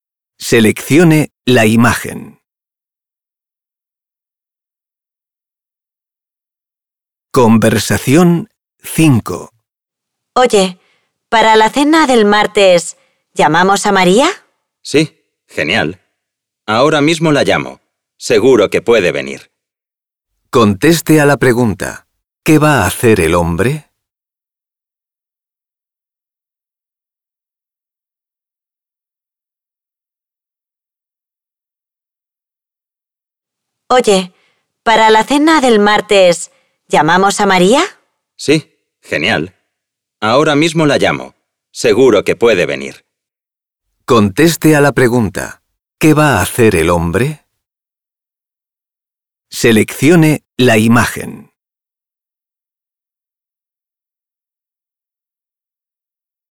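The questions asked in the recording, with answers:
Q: ¿qué va a hacer el hombre?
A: Llamar a María por teléfono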